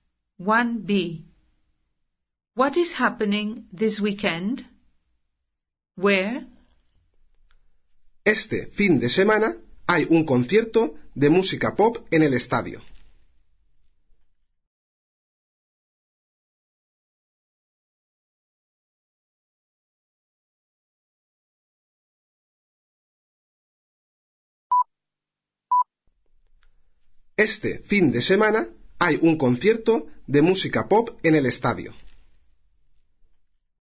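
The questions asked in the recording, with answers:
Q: What is happening this weekend?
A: A pop concert

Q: Where?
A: At the stadium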